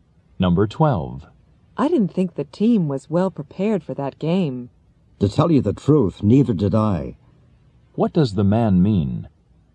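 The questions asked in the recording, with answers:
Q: What does the man mean?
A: He agrees the team wasn't well prepared.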